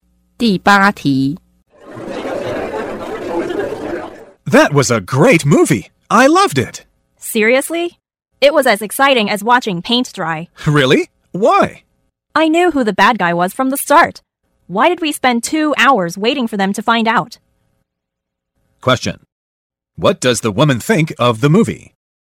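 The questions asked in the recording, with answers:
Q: What does the woman think of the movie?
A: It was boring.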